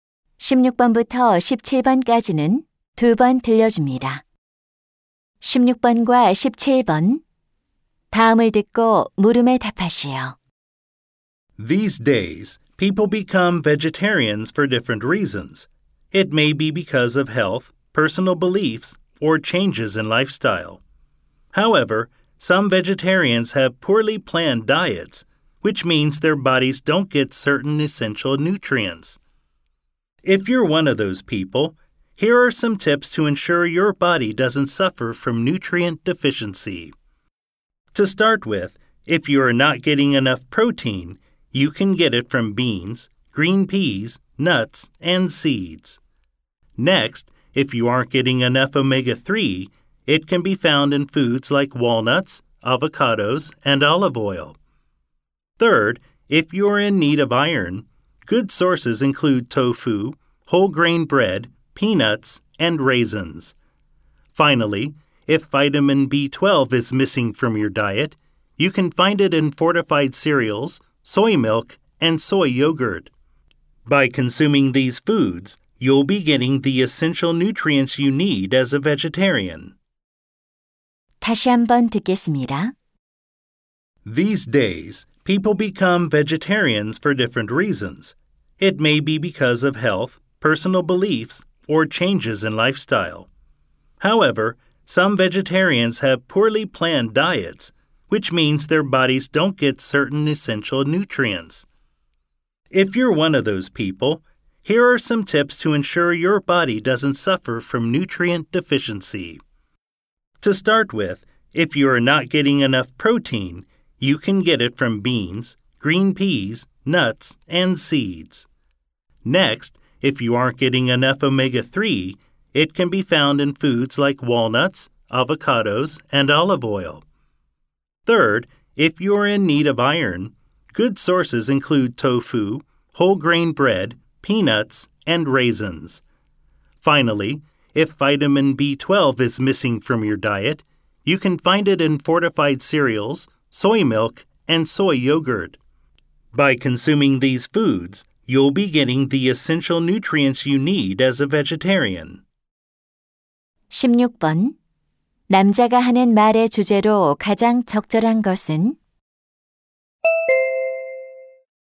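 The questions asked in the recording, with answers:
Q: 남자가 하는 말의 주제로 가장 적절한 것은?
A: 채식주의자가 필수 영양소를 섭취할 수 있는 음식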